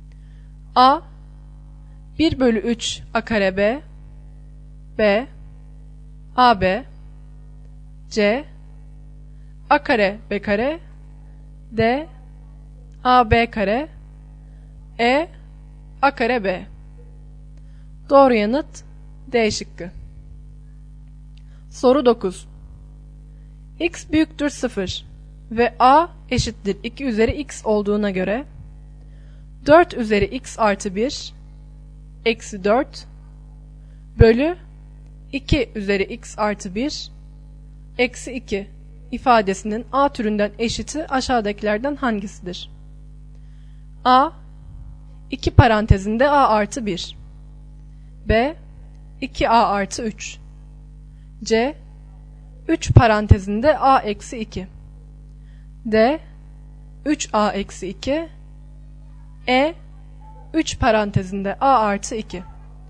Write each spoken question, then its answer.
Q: X büyüktür 0. ve A eşittir 2 üzeri x olduğuna göre 4 üzeri x artı 1 eksi 4 bölü 2 üzeri x artı 1 eksi 2 ifadesinin A türünden eşiti aşağıdakilerden hangisidir?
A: Doğru yanıt A şıkkı.